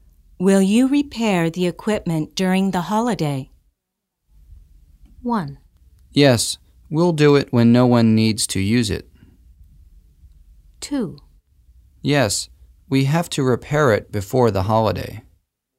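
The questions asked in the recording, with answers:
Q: Will you repair the equipment during the holiday?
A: 1: Yes, we'll do it when no one needs to use it.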